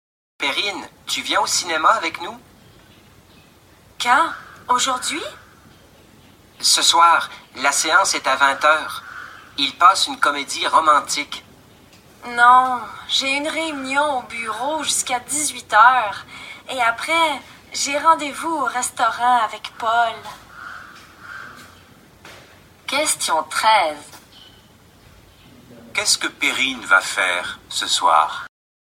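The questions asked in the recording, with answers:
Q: Qu'est-ce que Perrine va faire ce soir?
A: Dîner au restaurant avec Paul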